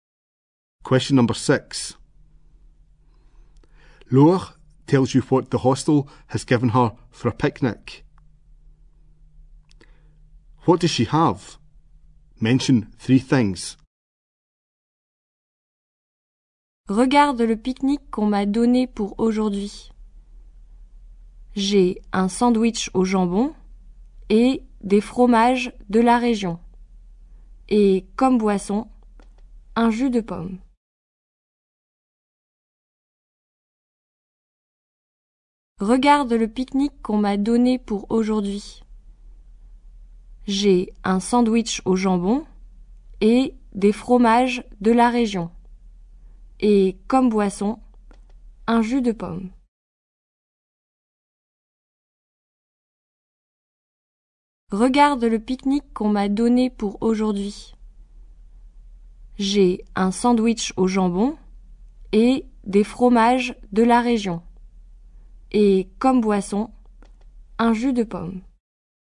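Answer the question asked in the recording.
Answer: A ham sandwich, local cheeses, apple juice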